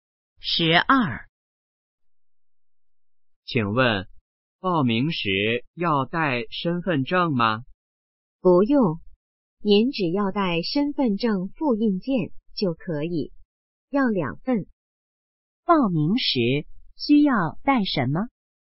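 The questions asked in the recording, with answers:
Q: 报名时需要带什么?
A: 两份身份证复印件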